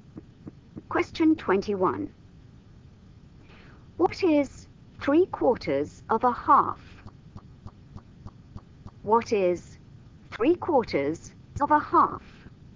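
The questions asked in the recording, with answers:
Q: What is 3/4 of a half?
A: 3/8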